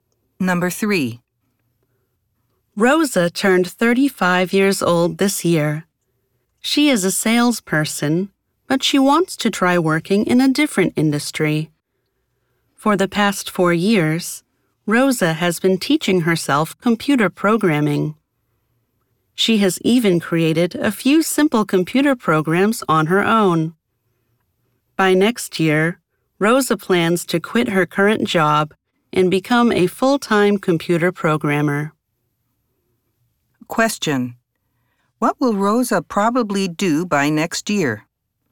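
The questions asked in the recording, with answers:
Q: What will Rosa probably do by next year?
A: Quit her job and become a full-time computer programmer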